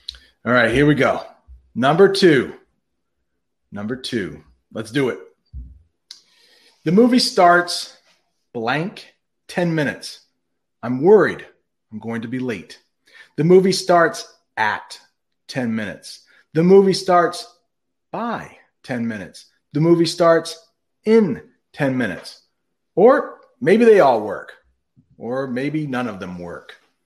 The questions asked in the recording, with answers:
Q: The movie starts blank 10 minutes.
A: Yes, the movie starts in 10 minutes.